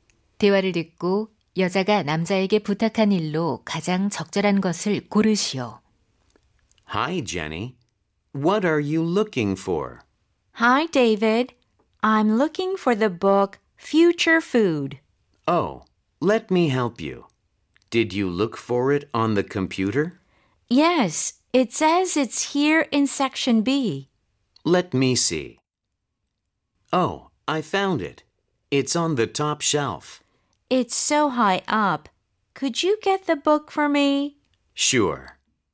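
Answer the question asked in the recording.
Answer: 맨 위 선반의 책 꺼내 주기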